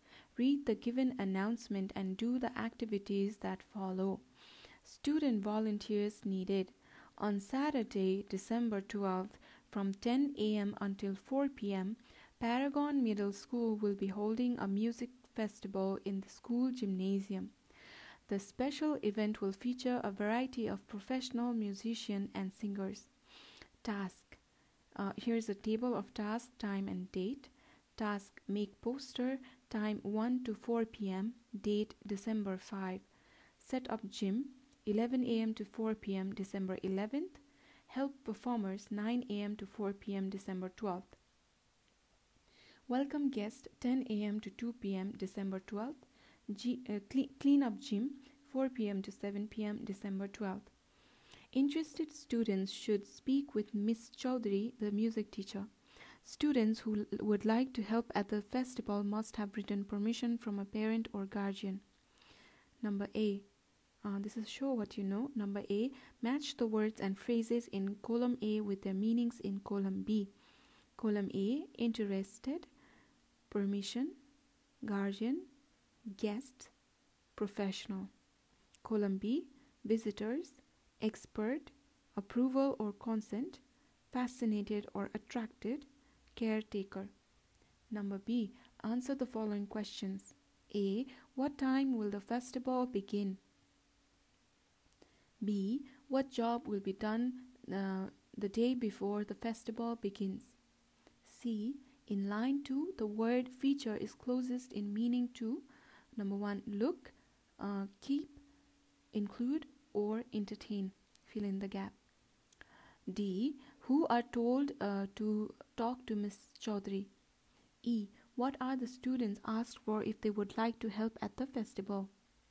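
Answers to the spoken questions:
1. 10 a.m.
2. Setting up the gym
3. include
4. Interested students
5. Written permission from a parent or guardian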